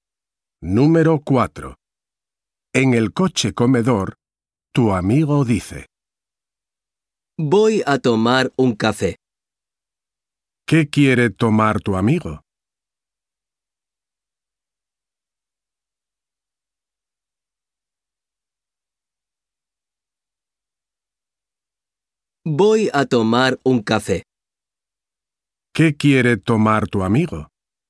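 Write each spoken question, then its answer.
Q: ¿Qué quiere tomar tu amigo?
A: Un café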